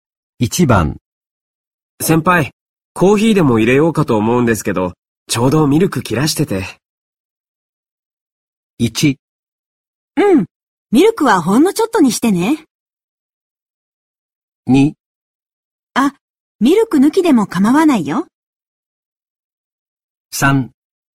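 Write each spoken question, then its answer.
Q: 先輩、コーヒーでも入れようかと思うんですけど、ちょうどミルク切らしてて。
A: 2: あ、ミルク抜きでも構わないよ。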